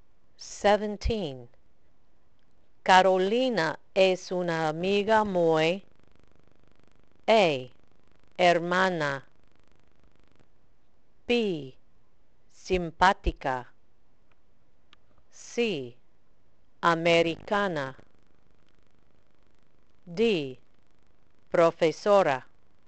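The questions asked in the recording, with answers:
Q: Carolina es una amiga muy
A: B: simpática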